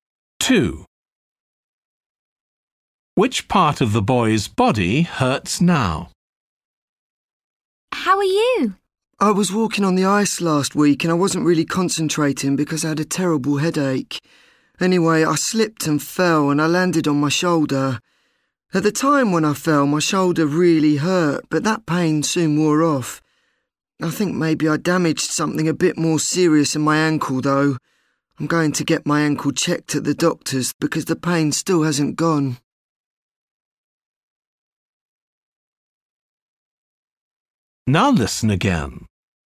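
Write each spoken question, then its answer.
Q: Which part of the boy's body hurts now?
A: his ankle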